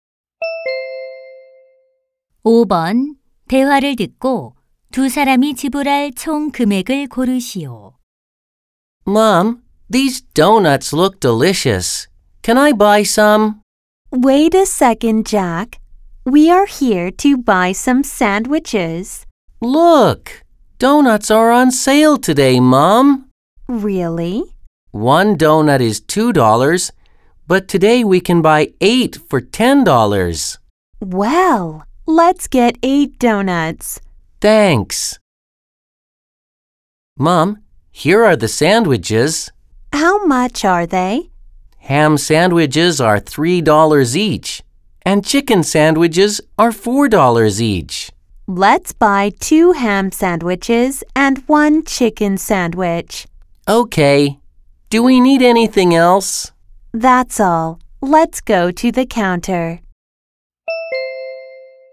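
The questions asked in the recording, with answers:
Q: 대화를 듣고 두 사람이 지불할 총 금액을 고르시오.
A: $20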